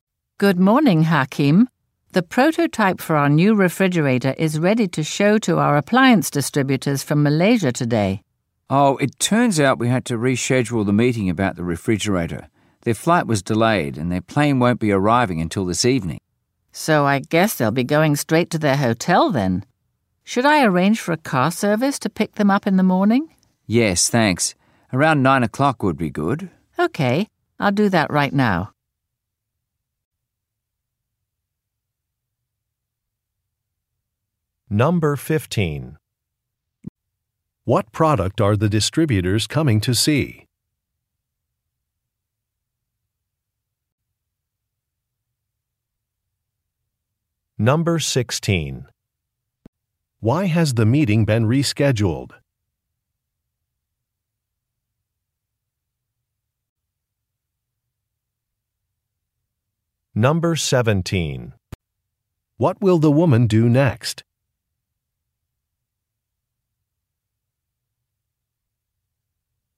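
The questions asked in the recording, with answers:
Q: What product are the distributors coming to see?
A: A new refrigerator

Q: Why has the meeting been rescheduled?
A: The distributors' flight was delayed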